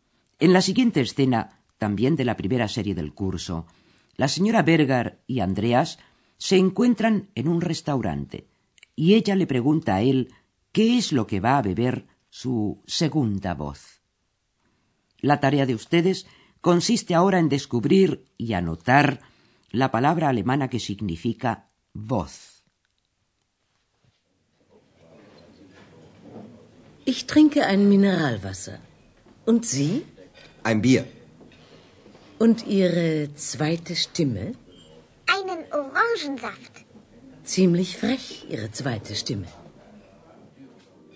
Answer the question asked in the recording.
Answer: esa es la palabra Stimme.